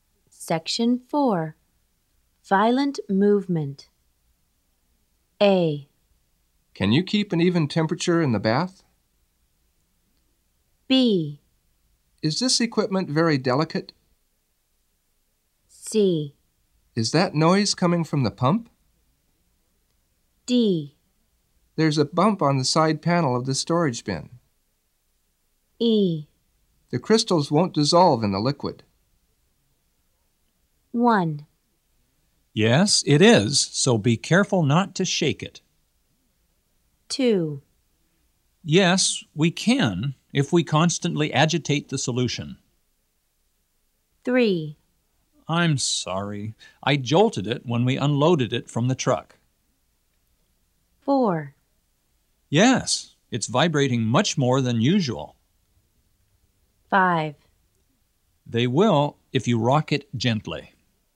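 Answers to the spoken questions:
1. B: Is this equipment very delicate?
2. A: Can you keep an even temperature in the bath?
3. D: There's a bump on the side panel of the storage bin.
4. C: Is that noise coming from the pump?
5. E: The crystals won't dissolve in the liquid.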